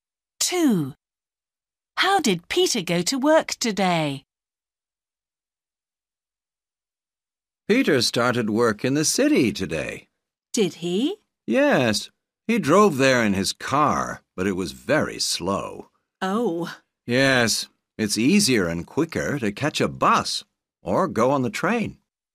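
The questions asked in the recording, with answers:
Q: How did Peter go to work today?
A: He drove his car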